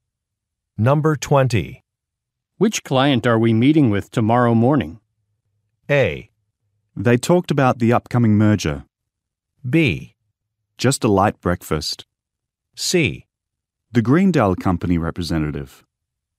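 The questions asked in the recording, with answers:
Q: Which client are we meeting with tomorrow morning?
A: C: The Greendale Company representative.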